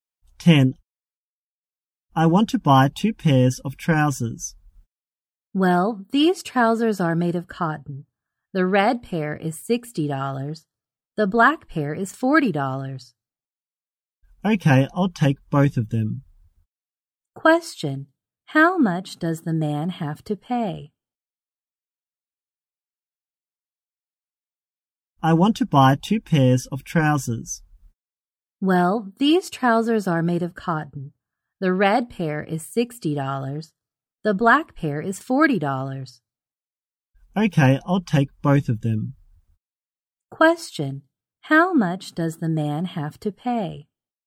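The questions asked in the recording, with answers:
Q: Question. How much does the man have to pay?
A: $100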